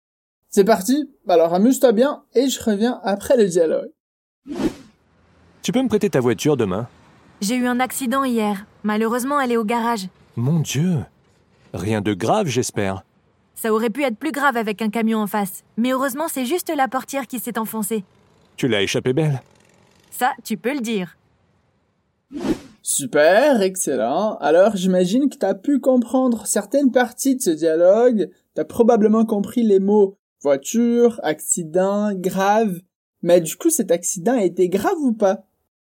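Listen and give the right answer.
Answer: Non, pas grave : c'est juste la portière qui s'est enfoncée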